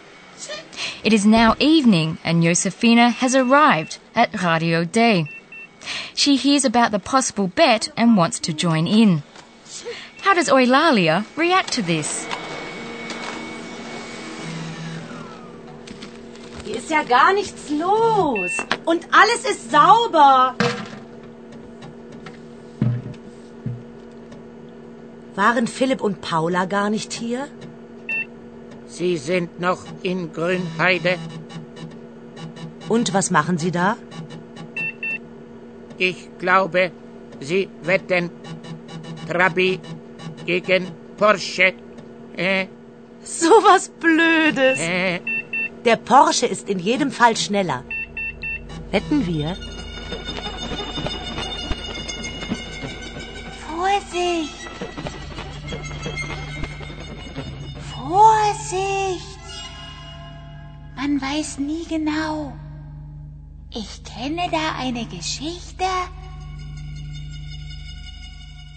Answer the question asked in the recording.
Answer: Eulalia warns her to be careful because you never really know for sure.